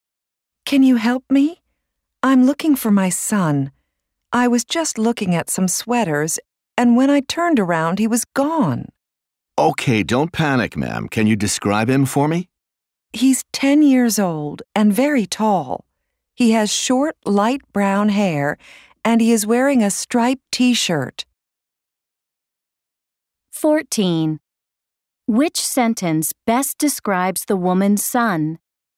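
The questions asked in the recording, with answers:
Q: Which sentence best describes the woman's son?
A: He is 10, very tall, with short light brown hair and a striped T-shirt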